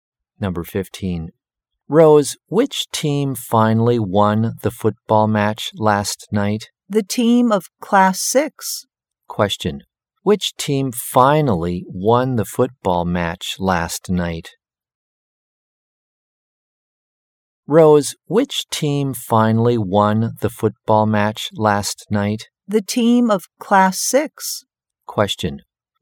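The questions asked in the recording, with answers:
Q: Which team finally won the football match last night?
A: The team of Class 6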